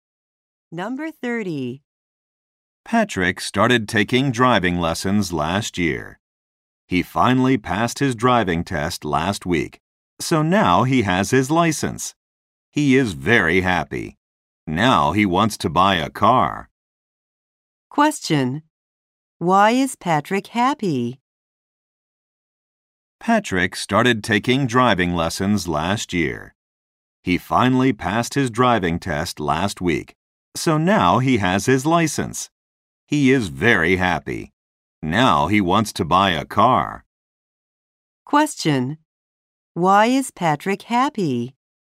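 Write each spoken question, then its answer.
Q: Why is Patrick happy?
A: He passed his driving test.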